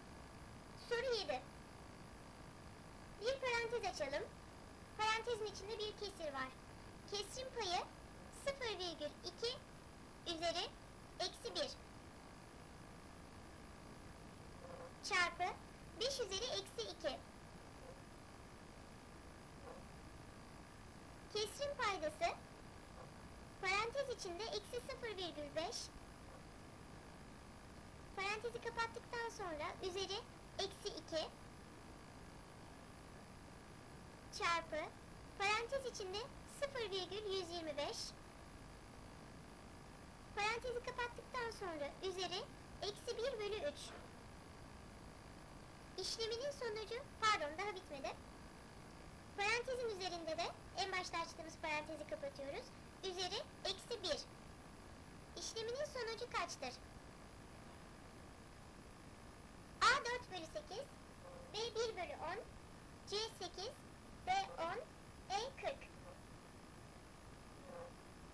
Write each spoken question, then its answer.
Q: İşleminin sonucu kaçtır?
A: Doğru cevap E 40.